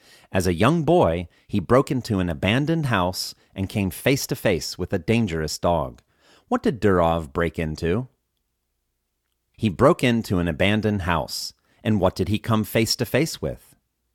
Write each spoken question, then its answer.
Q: And what did he come face to face with?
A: He came face to face with a dangerous dog.